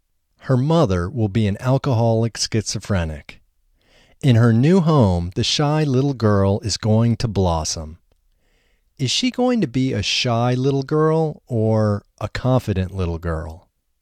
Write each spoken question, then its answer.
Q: Is she going to be a shy little girl or a confident little girl?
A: She is going to be a shy little girl.